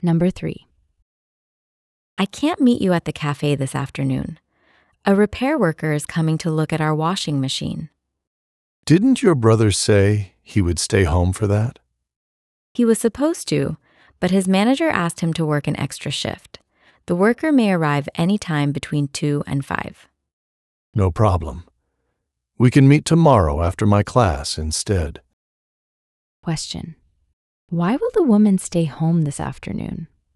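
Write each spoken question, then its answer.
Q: Why will the woman stay home this afternoon?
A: A repair worker is coming to look at the washing machine, and her brother has to work an extra shift.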